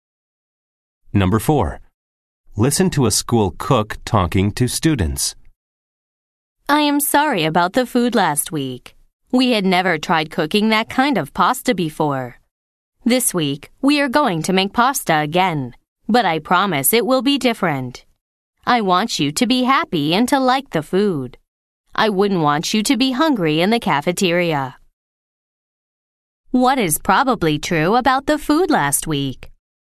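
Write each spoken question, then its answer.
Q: What is probably true about the food last week?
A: The students did not like the pasta.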